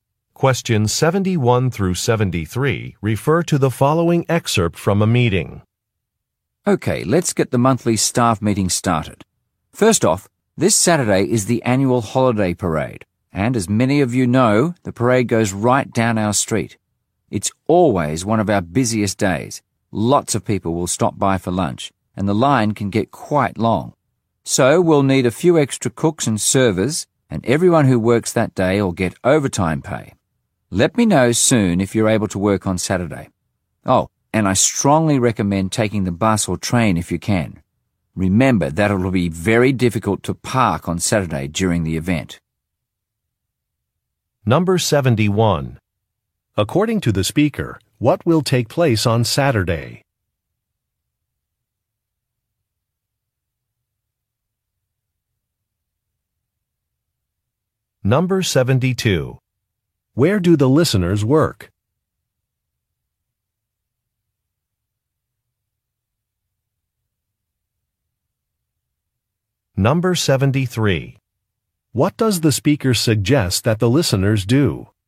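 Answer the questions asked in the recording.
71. A holiday parade
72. At a restaurant
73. Take public transportation (bus or train)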